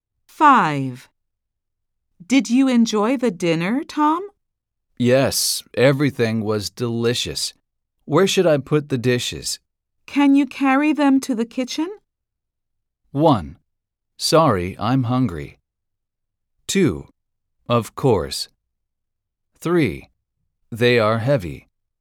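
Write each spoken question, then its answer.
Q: Can you carry them to the kitchen?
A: 2: Of course.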